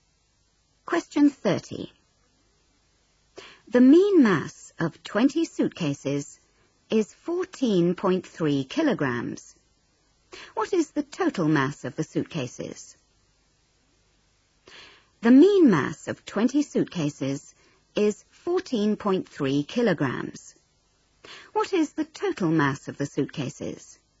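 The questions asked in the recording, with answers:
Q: What is the total mass of the suitcases?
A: 286 kg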